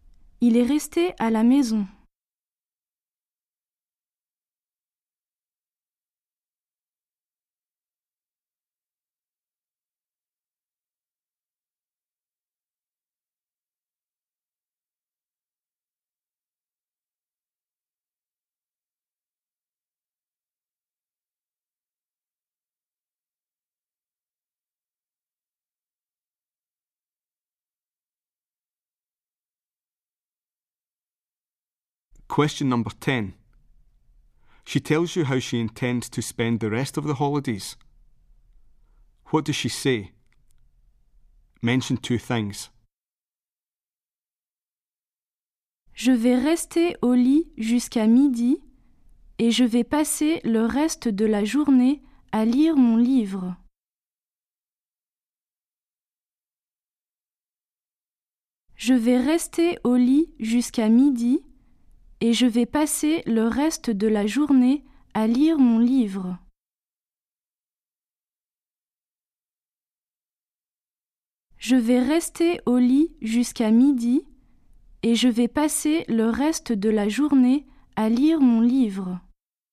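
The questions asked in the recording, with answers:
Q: What does she say? Mention two things.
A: She'll stay in bed until midday; she'll spend the rest of the day reading her book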